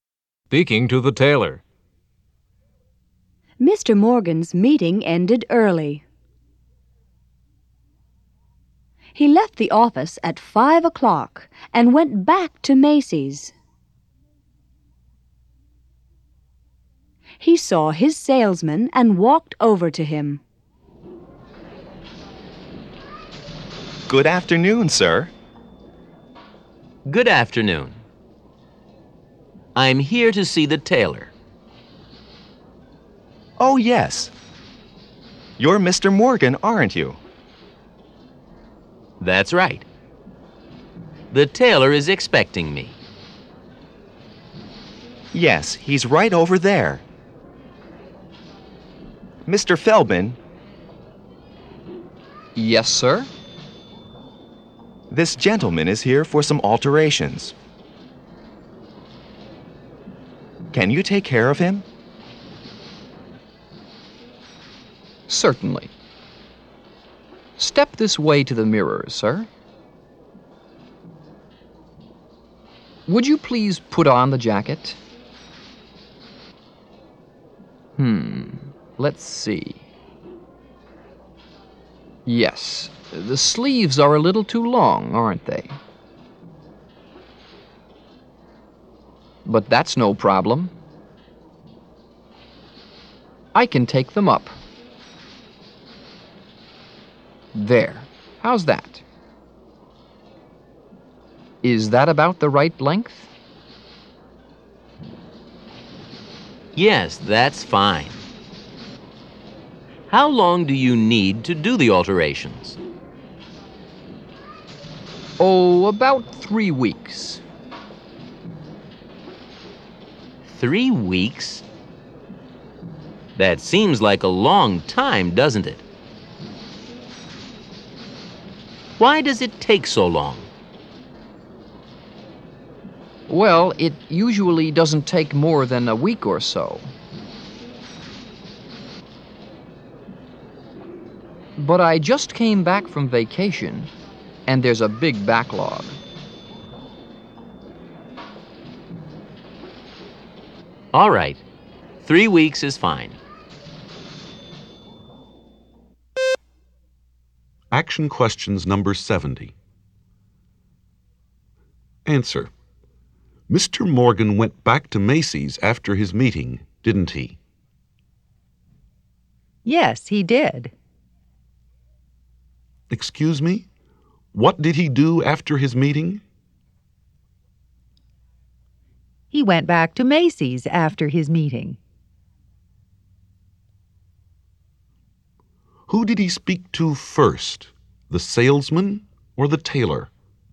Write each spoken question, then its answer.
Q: Who did he speak to first? The salesman or the tailor?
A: He spoke to the salesman first.